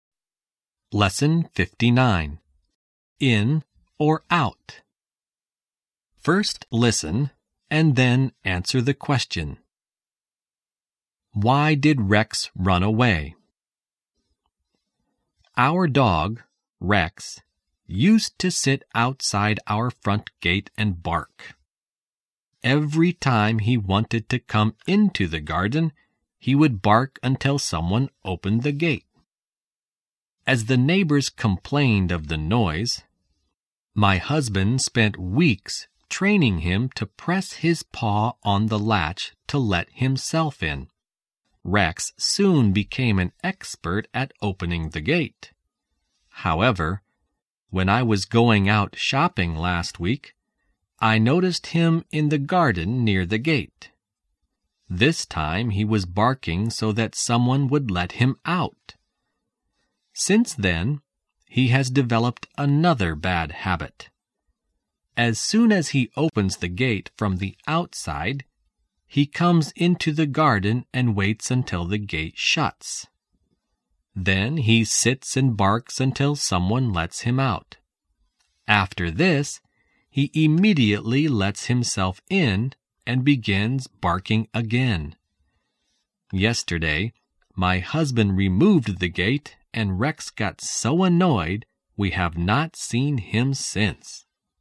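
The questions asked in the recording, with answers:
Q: Why did Rex run away?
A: Because the husband removed the gate and Rex got annoyed.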